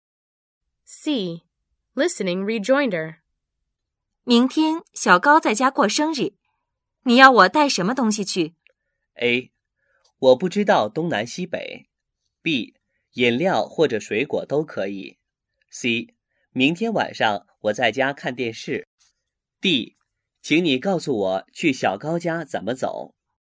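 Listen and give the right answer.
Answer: B: 饮料或者水果都可以。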